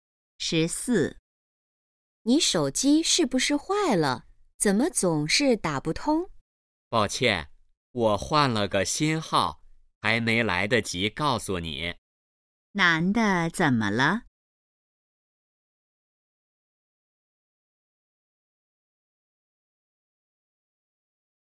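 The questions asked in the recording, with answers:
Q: 男的怎么了?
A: 换了新手机号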